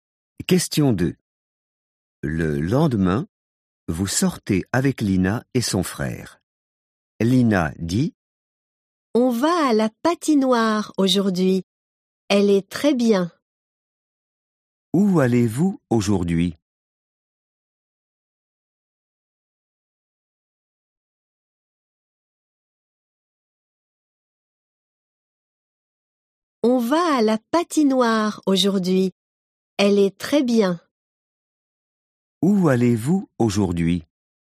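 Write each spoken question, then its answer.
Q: Où allez-vous aujourd'hui?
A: à la patinoire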